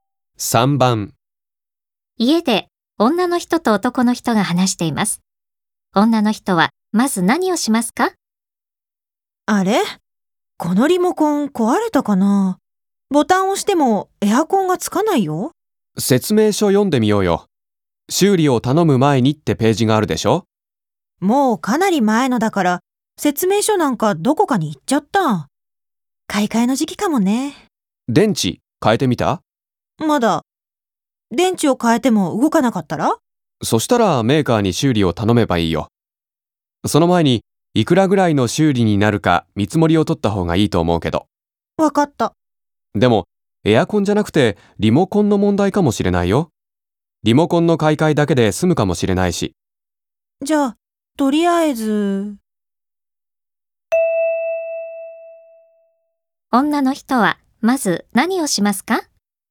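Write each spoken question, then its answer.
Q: 女の人はまず何をしますか?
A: リモコンの電池を替える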